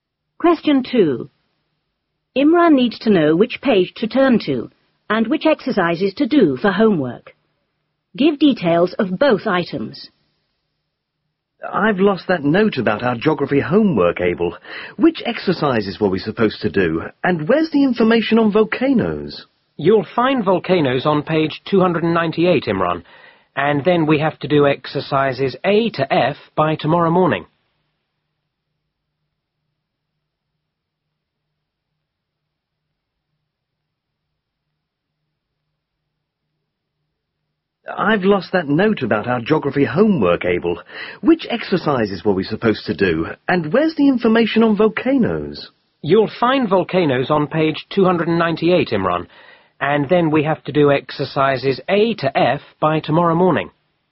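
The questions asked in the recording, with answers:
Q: Imran needs to know which page to turn to and which exercises to do for homework.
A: Page 298; exercises A to F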